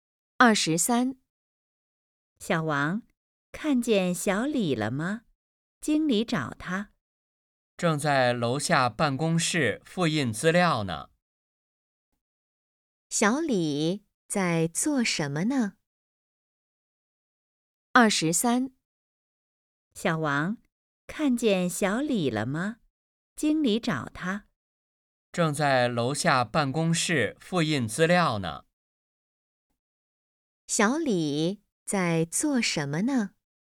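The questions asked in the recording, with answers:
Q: 小李在做什么呢?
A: 复印资料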